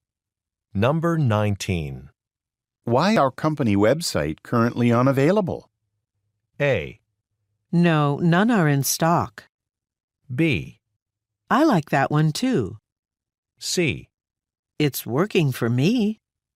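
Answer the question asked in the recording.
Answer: C: It's working for me.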